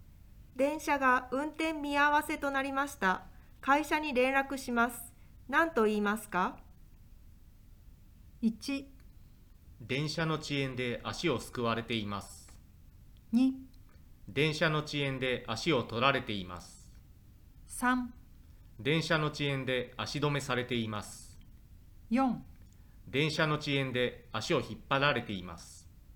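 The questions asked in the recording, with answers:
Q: 何と言いますか?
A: 3: 電車の遅延で足止めされています。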